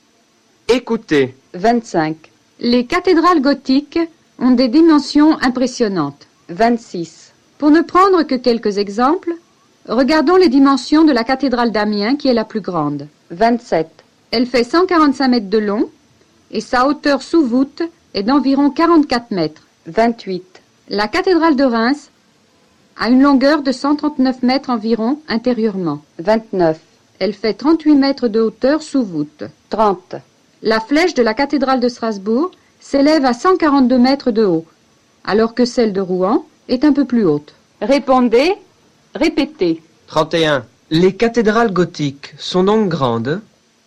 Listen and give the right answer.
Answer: Les cathédrales gothiques ont des dimensions impressionnantes.